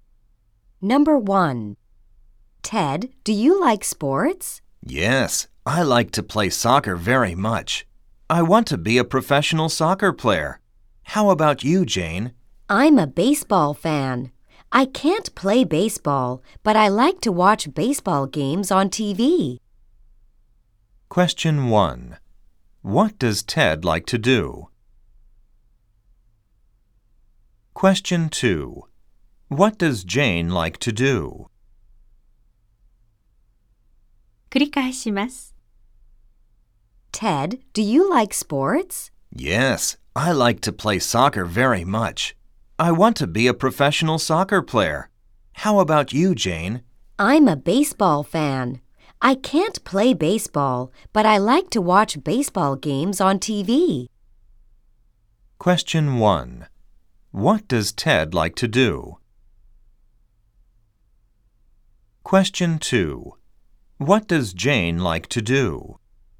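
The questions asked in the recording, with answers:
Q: What does Ted like to do?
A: He likes to play soccer.

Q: What does Jane like to do?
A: She likes to watch baseball games on TV.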